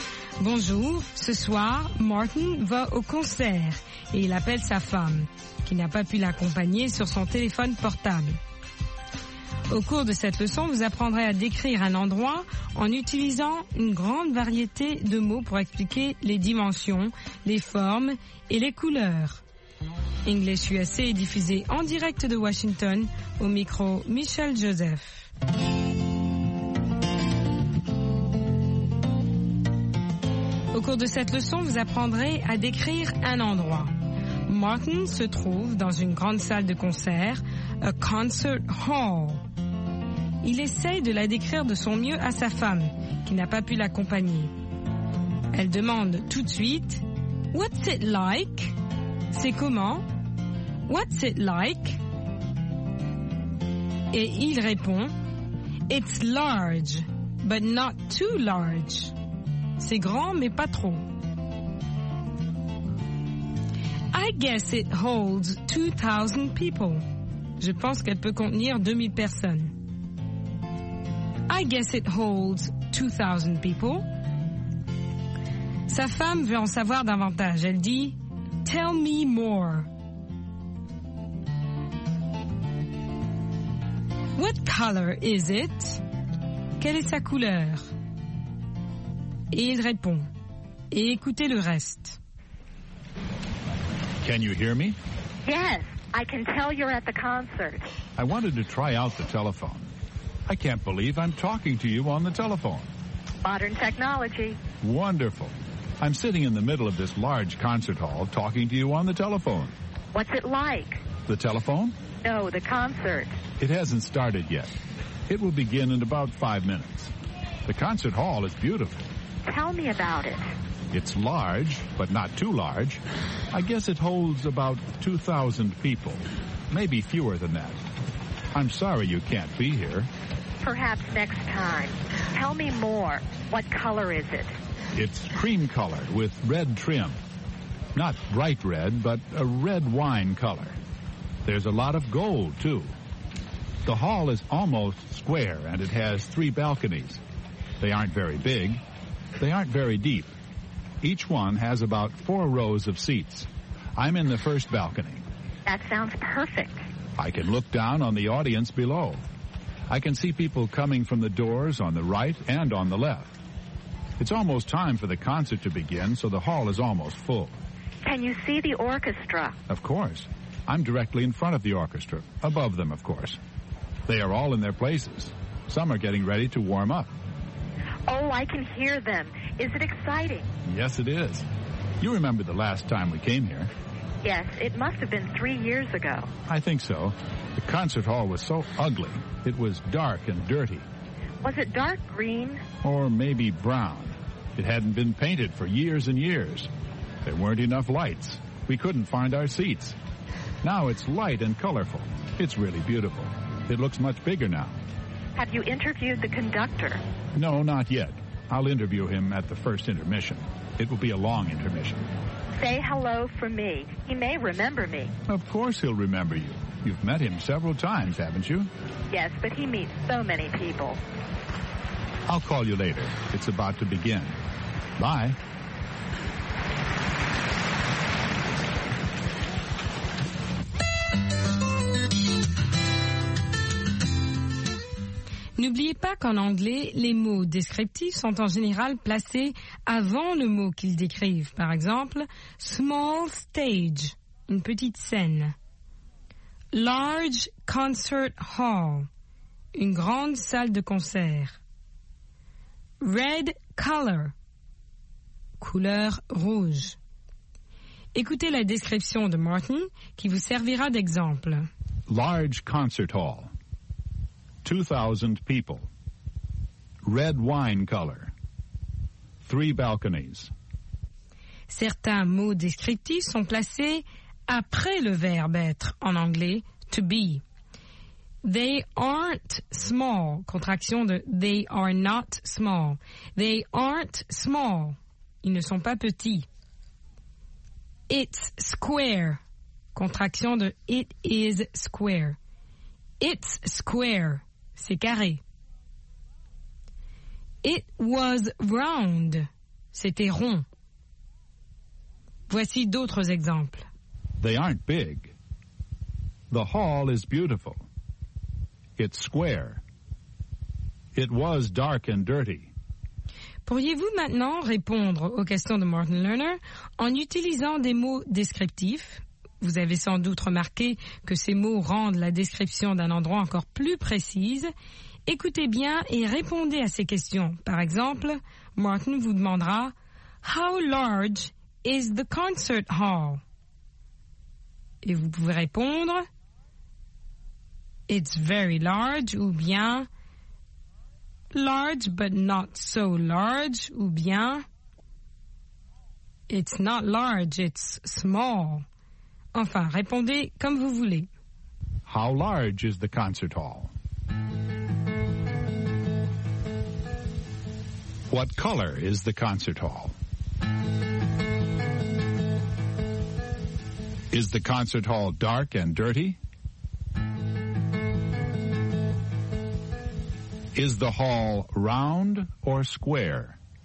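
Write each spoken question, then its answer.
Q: How large is the concert hall?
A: Large, but not too large (holds about 2,000 people)

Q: What color is the concert hall?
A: Cream color with red trim

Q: Is the concert hall dark and dirty?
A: No, it's light and colorful (it was dark and dirty before)

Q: Is the hall round or square?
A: Almost square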